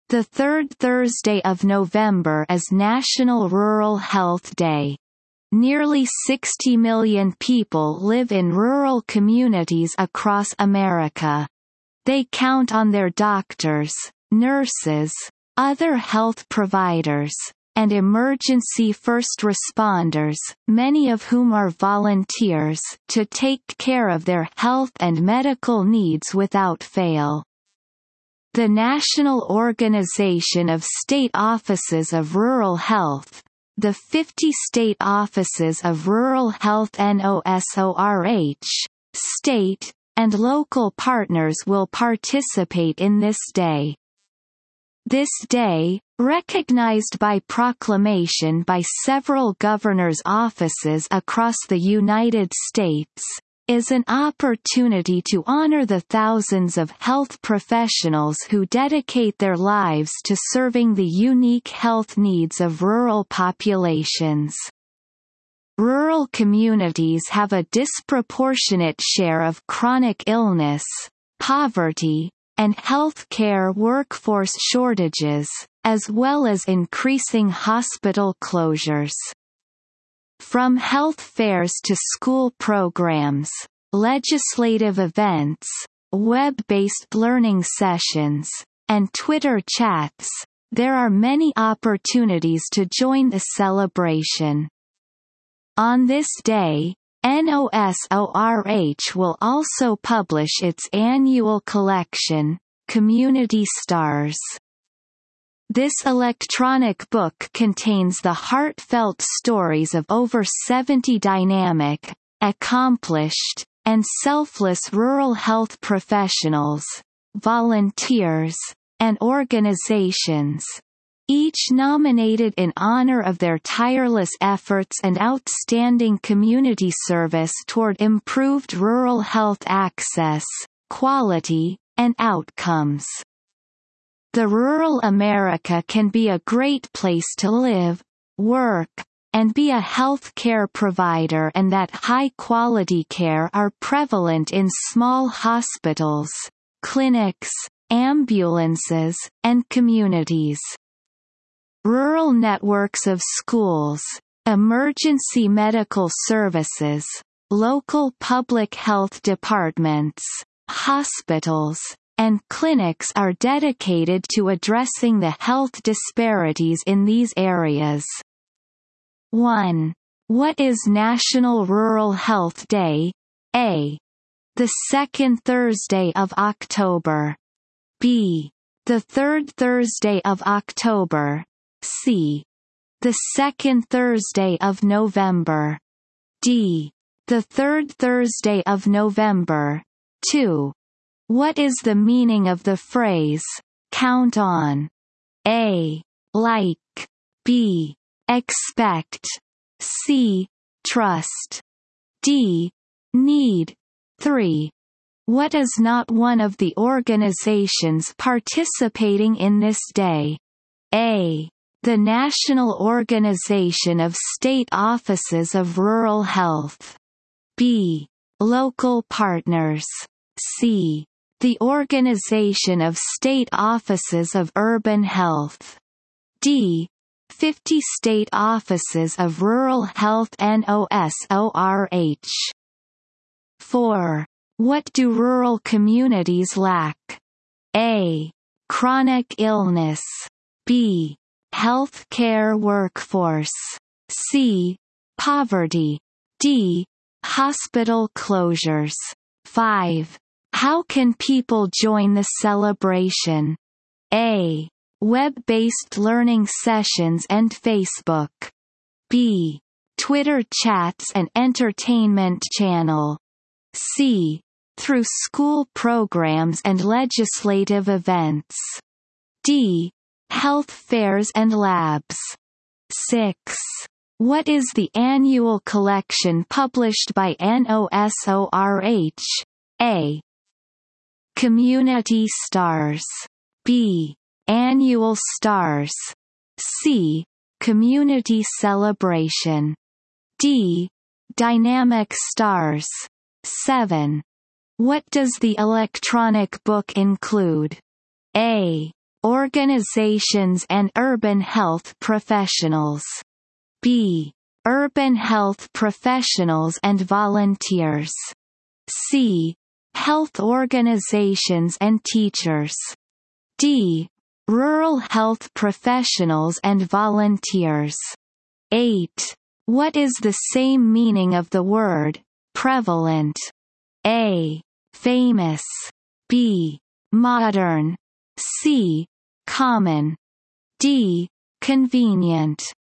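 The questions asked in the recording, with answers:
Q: What is National Rural Health Day?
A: D: The third Thursday of November.

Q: What is not one of the organizations participating in this day?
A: C: The Organization of State Offices of Urban Health.

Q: What do rural communities lack?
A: B: Health care workforce.

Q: How can people join the celebration?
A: C: Through school programs and legislative events.

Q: What is the annual collection published by NOSORH?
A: A: Community Stars.

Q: What does the electronic book include?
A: D: Rural health professionals and volunteers.

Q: What is the same meaning of the word, prevalent?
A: C: Common.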